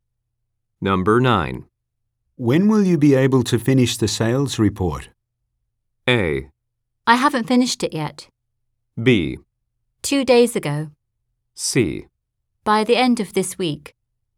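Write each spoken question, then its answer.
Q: When will you be able to finish the sales report?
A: C: By the end of this week.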